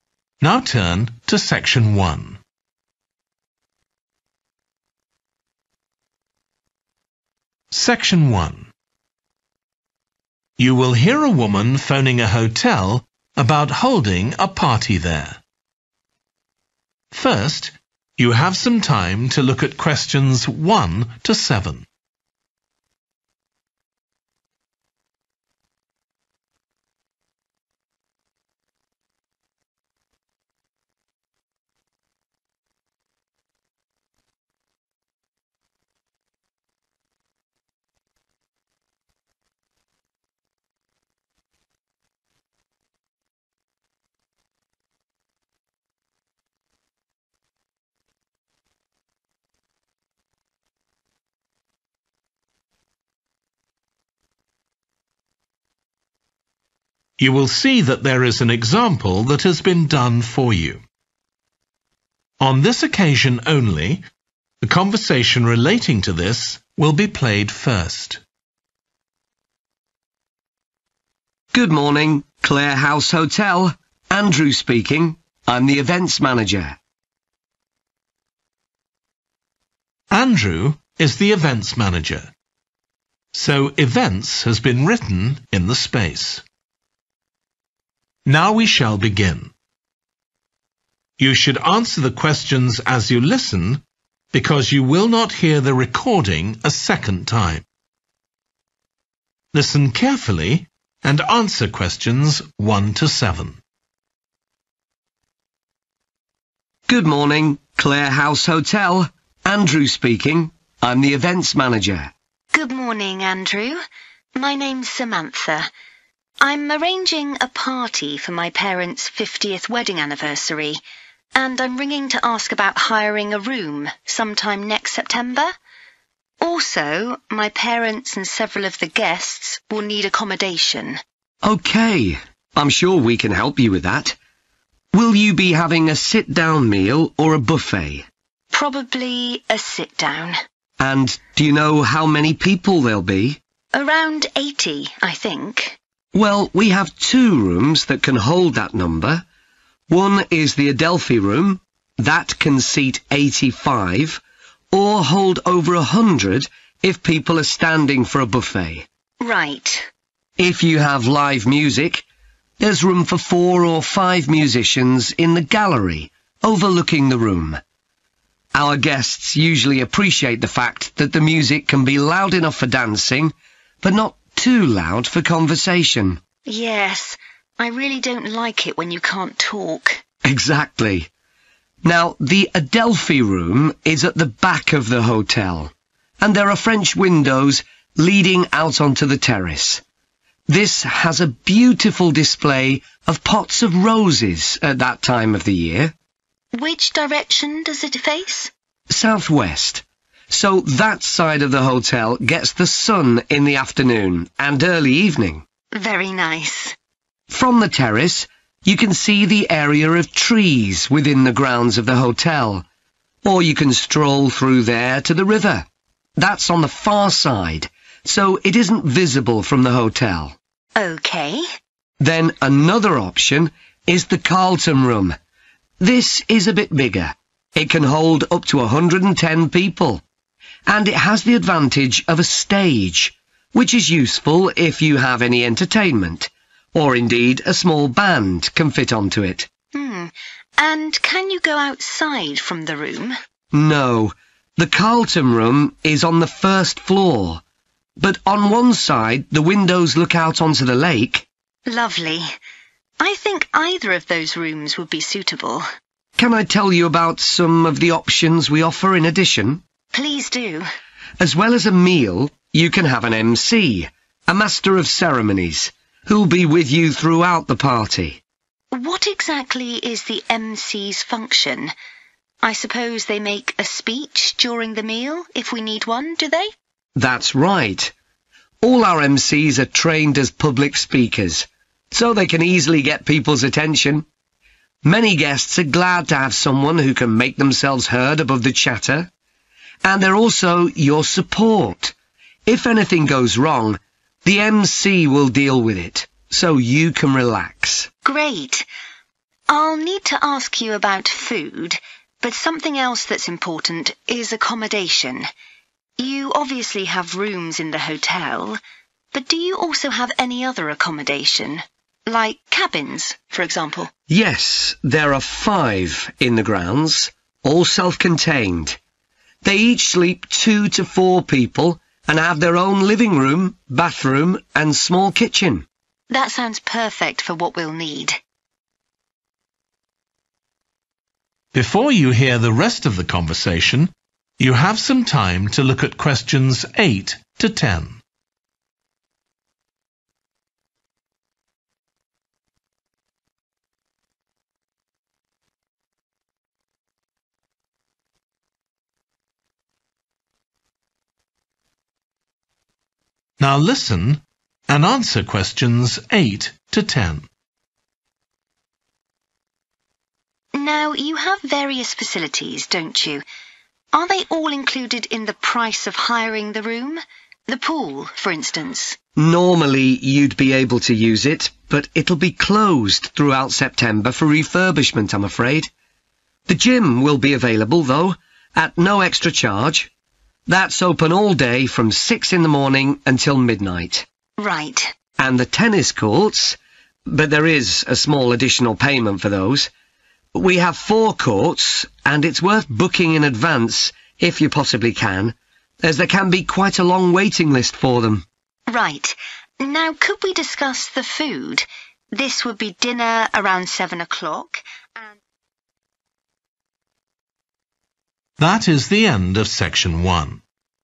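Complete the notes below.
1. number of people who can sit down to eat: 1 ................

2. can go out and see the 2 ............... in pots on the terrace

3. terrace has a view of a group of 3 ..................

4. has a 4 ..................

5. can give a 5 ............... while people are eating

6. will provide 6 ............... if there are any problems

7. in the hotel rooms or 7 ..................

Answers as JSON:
{"1": "85", "2": "roses", "3": "trees", "4": "stage", "5": "speech", "6": "support", "7": "cabins"}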